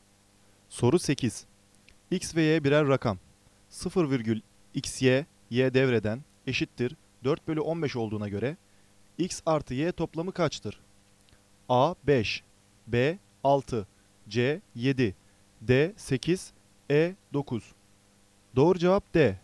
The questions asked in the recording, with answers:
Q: 0,xy, Y devreden eşittir 4 bölü 15 olduğuna göre X artı Y toplamı kaçtır?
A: Doğru cevap D.